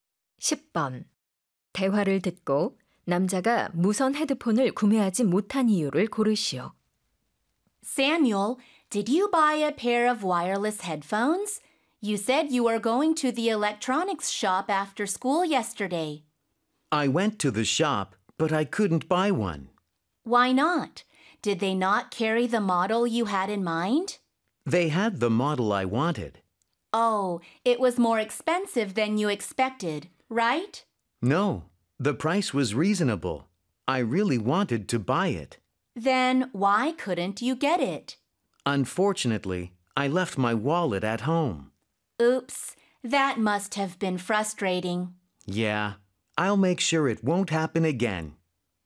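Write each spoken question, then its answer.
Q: 대화를 듣고 남자가 무선 헤드폰을 구매하지 못한 이유를 고르시오.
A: 지갑을 집에 두고 와서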